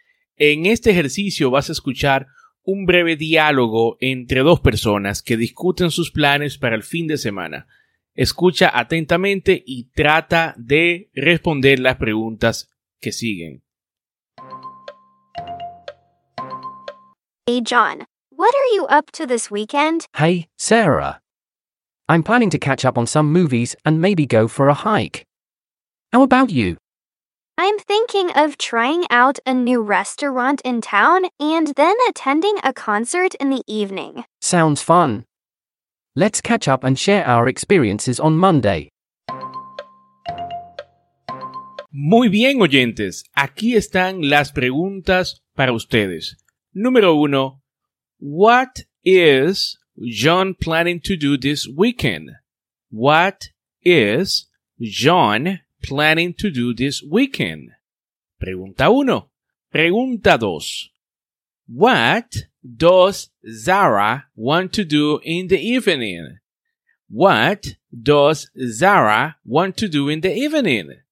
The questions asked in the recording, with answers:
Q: What is John planning to do this weekend?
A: John wants to catch up on movies and go for a hike

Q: What does Zara want to do in the evening?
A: Sarah wants to try out a new restaurant and attend a concert